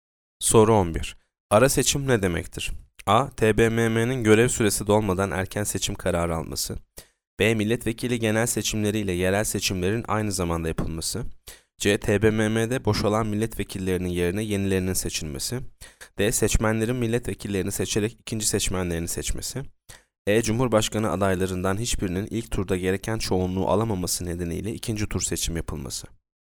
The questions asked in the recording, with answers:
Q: Ara seçim ne demektir?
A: Yanıt C. TBMM'de boşalan milletvekillerinin yerine yenilerinin seçilmesi.